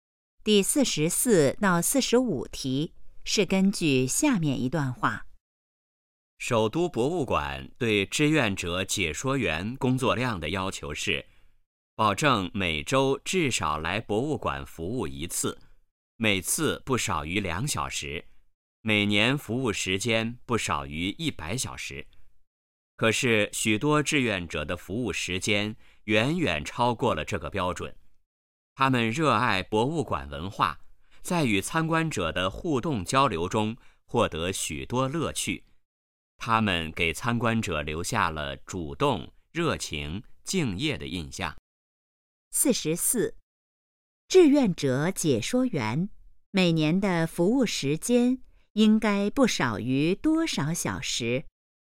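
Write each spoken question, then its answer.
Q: 志愿者解说员每年的服务时间应该不少于多少小时?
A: 100小时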